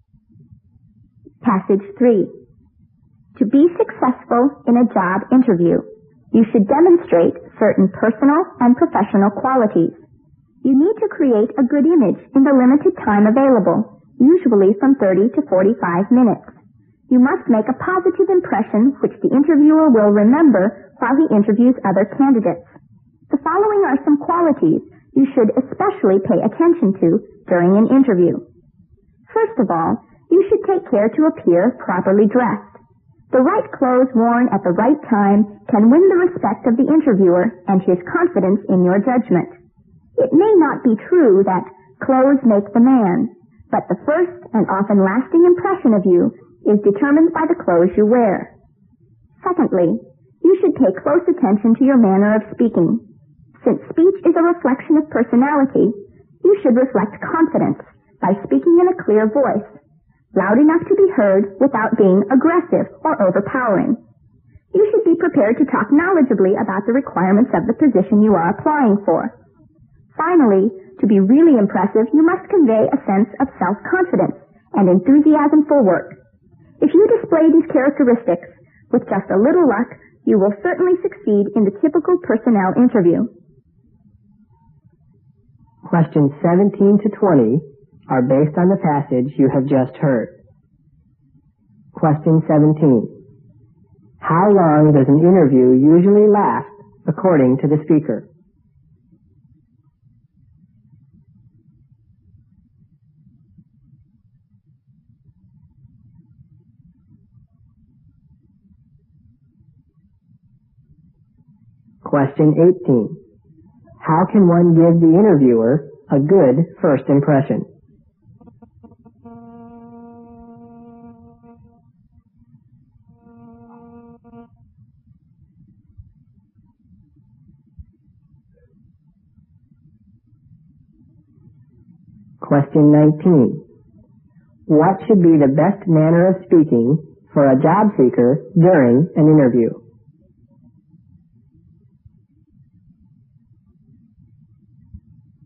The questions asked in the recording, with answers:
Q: How long does an interview usually last according to the speaker?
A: from 30 to 45 minutes

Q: How can one give the interviewer a good first impression?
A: He should be dressed properly

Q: What should be the best manner of speaking for a job seeker during an interview?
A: 应该自信,但是呢又不要过分,不要 aggressive 啊